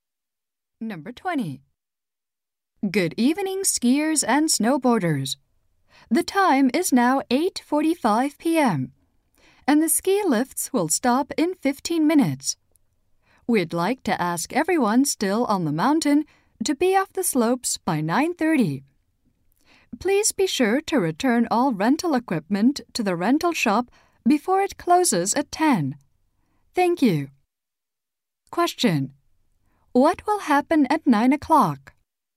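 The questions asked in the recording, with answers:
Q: What will happen at 9 o'clock?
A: The ski lifts will stop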